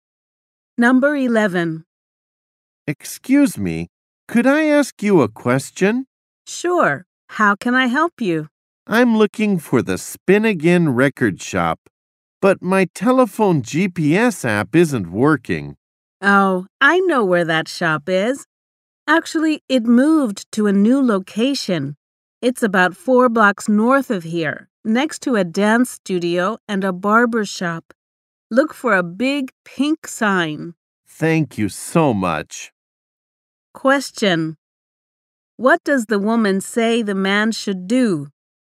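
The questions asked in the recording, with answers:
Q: Question. What does the woman say the man should do?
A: Go about 4 blocks north and look for a big pink sign.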